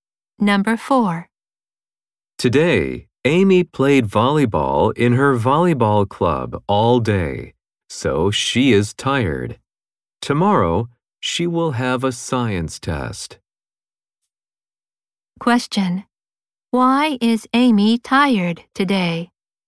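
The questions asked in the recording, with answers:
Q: Why is Amy tired today?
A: She played volleyball in her club all day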